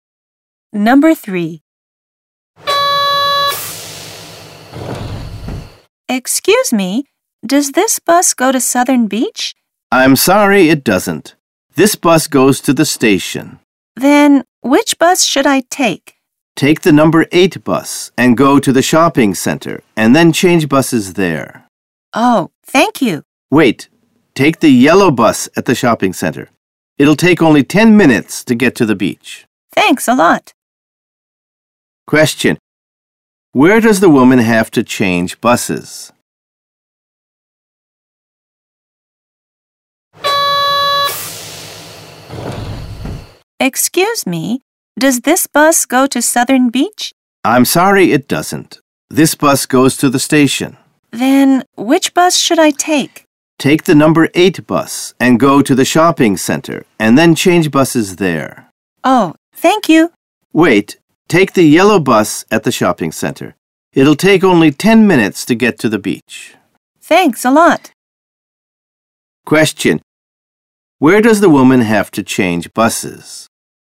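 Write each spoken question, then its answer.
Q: Where does the woman have to change buses?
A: At the shopping center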